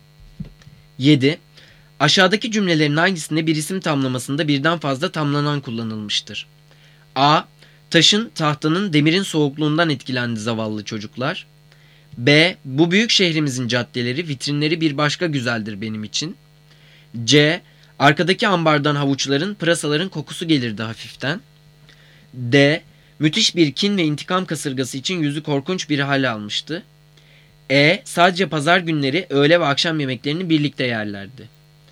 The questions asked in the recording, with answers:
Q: Aşağıdaki cümlelerin hangisinde bir isim tamlamasında birden fazla tamlanan kullanılmıştır?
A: Cevap B. Bu büyük şehrimizin caddeleri, vitrinleri bir başka güzeldir benim için.